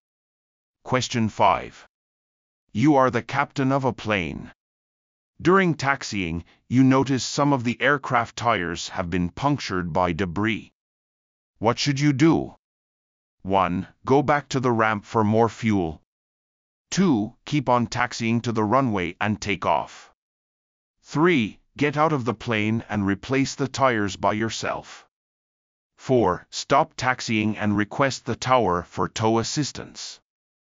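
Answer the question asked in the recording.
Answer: 4: Stop taxiing and request the tower for tow assistance.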